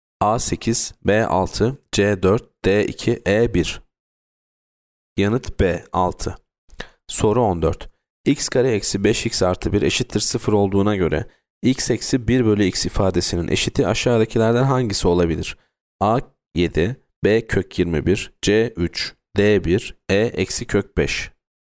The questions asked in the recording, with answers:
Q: x kare eksi 5x artı 1 eşittir 0 olduğuna göre x eksi 1 bölü x ifadesinin eşiti aşağıdakilerden hangisi olabilir?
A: Yanıt B kök 21.